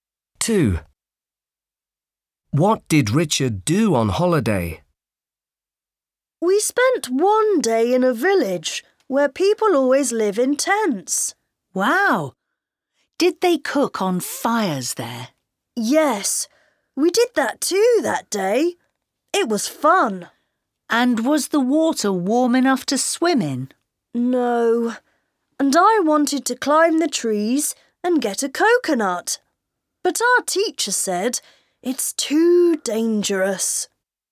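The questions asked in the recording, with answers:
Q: What did Richard do on holiday?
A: He cooked on fires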